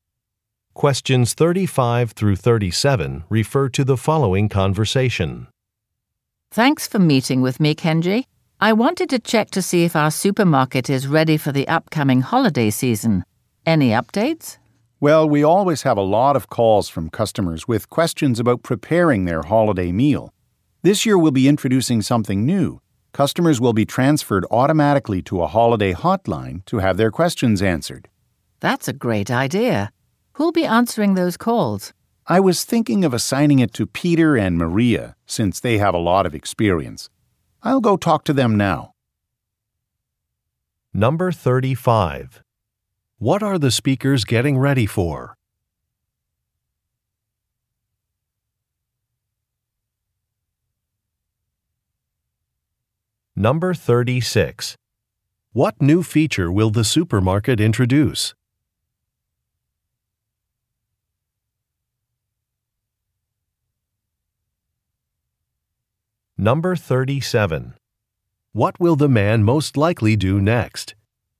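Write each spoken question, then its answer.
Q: What are the speakers getting ready for?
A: The holiday season

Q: What new feature will the supermarket introduce?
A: A holiday hotline

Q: What will the man most likely do next?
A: Talk to Peter and Maria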